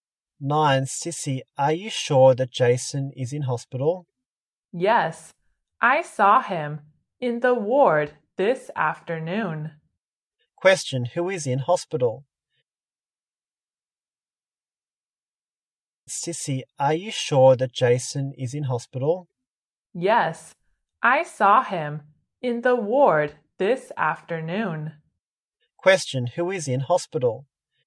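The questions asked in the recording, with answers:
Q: Question, who is in hospital?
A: Jason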